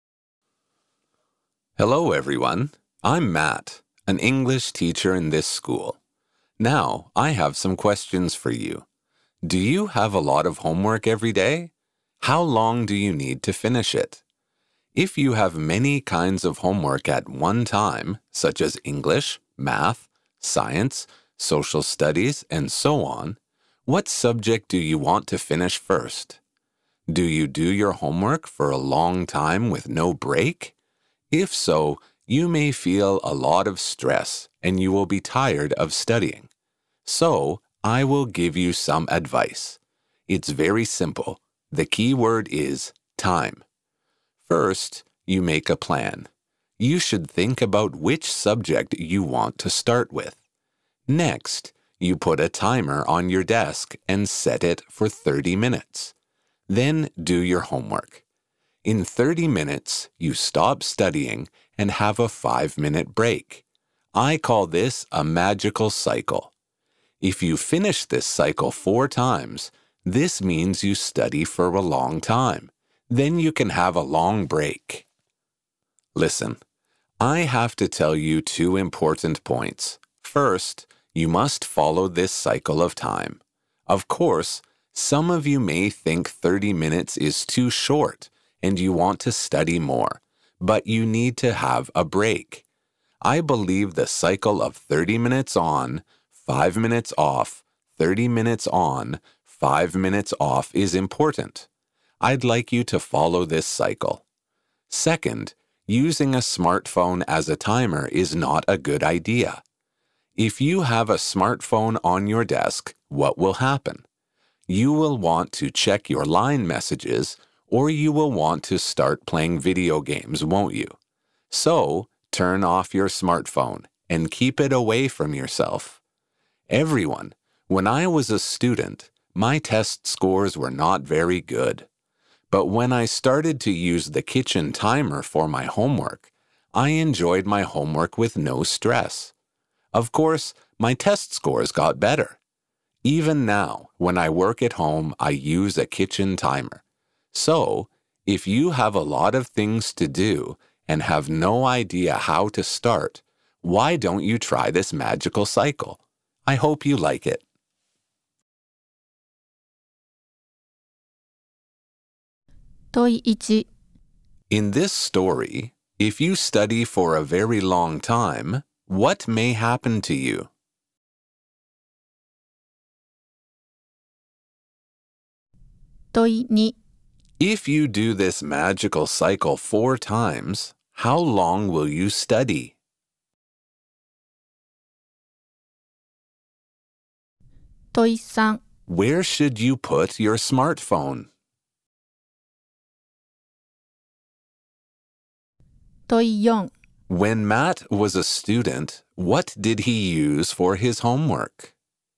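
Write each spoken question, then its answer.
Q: In this story, if you study for a very long time, what may happen to you?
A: You may feel a lot of stress and get tired of studying

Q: Where should you put your smartphone?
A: Away from yourself, turned off

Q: When Matt was a student, what did he use for his homework?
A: A kitchen timer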